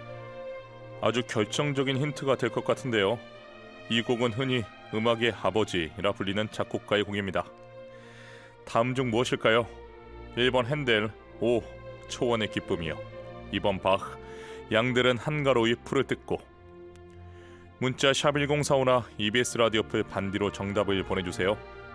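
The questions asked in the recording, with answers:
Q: 다음 중 무엇일까요? 1번 헨델, 오, 초원의 기쁨이요. 2번 바흐, 양들은 한가로이 풀을 뜯고.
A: 2: 바흐, 양들은 한가로이 풀을 뜯고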